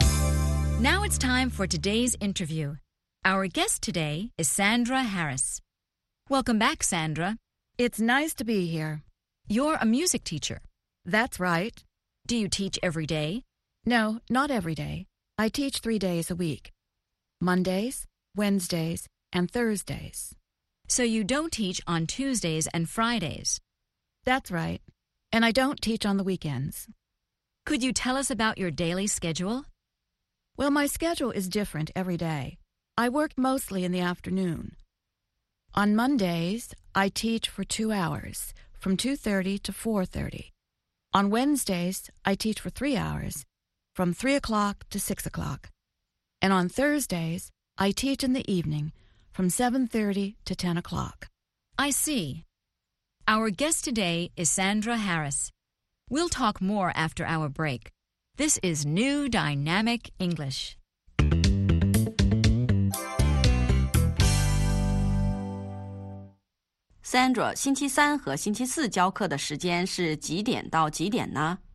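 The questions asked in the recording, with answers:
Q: Sandra, 星期三和星期四教课的时间是几点到几点呢?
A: 星期三从三点到六点,星期四从七点半到十点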